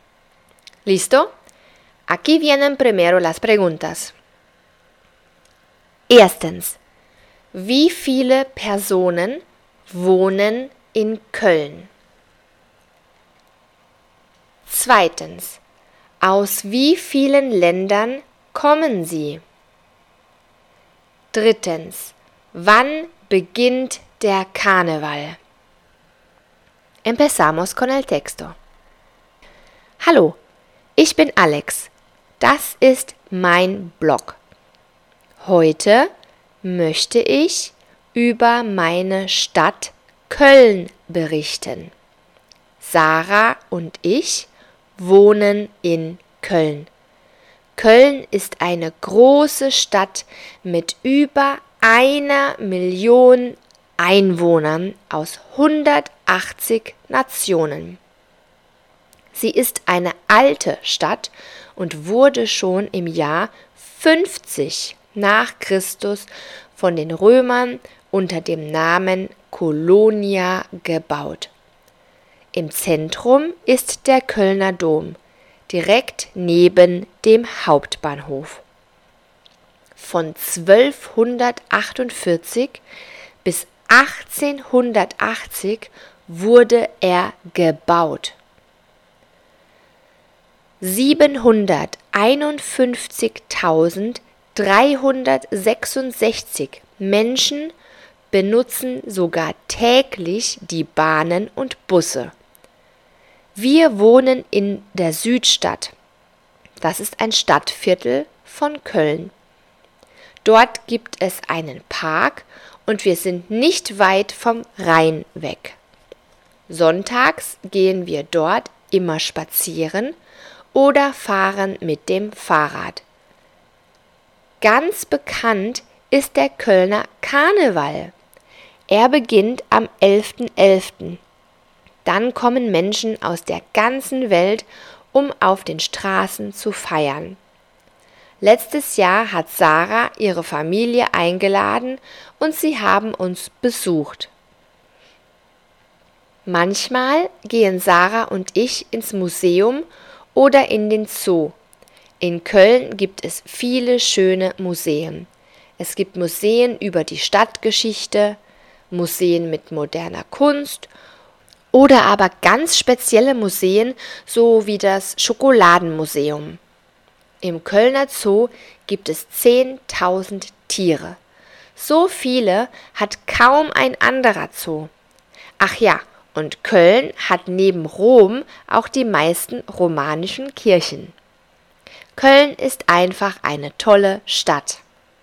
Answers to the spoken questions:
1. Über 1 Million.
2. Aus 180.
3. Am 11. November.